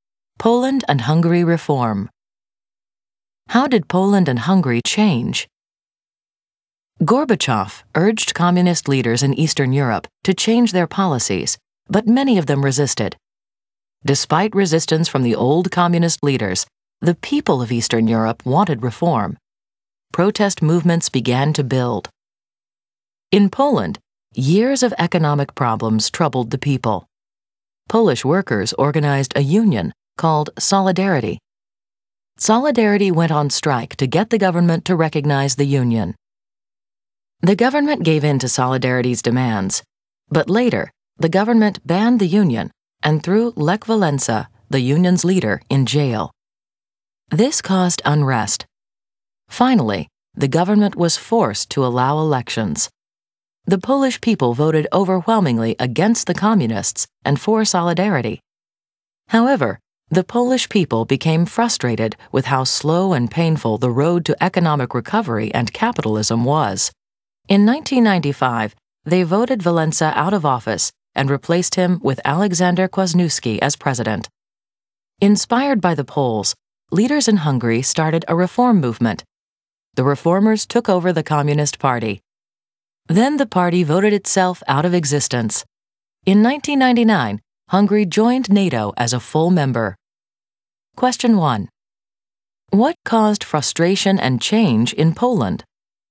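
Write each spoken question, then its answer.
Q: What caused frustration and change in Poland?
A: Economic problems and the slow, painful road to recovery led to Solidarity strikes, elections, and voting Walesa out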